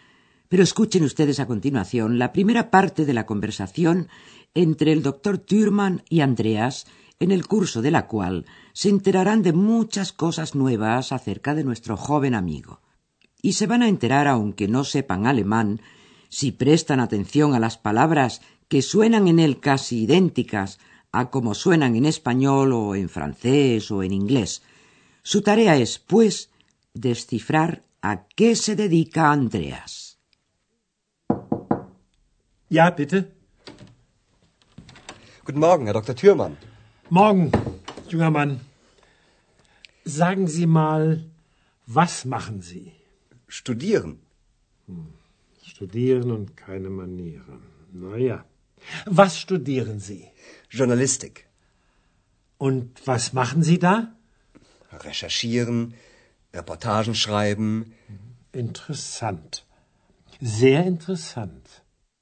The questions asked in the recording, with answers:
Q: Su tarea es, pues, descifrar a qué se dedica Andreas.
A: Andreas estudia journalistic, es decir, periodismo.